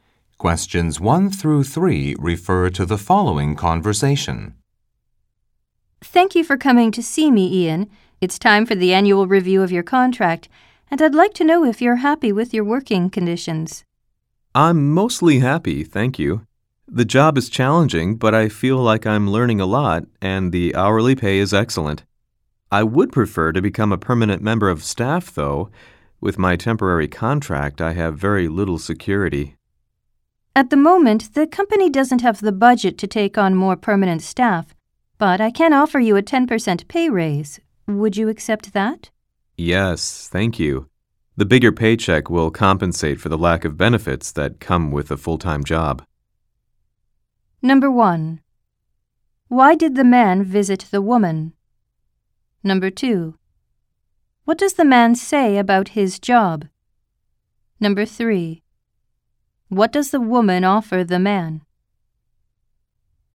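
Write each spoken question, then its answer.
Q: Why did the man visit the woman?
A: For the annual review of his contract

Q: What does the man say about his job?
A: It is challenging, but he is learning a lot and the pay is excellent

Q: What does the woman offer the man?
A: A 10% pay raise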